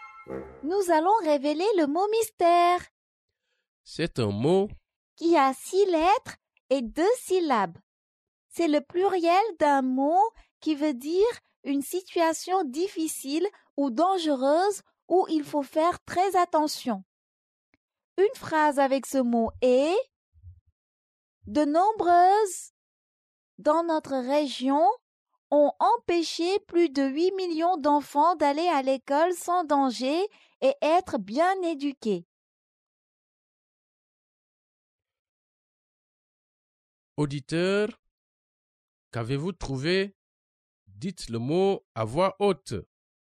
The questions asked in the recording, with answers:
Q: Auditeur, qu'avez-vous trouvé?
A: Le mot mystère est crise.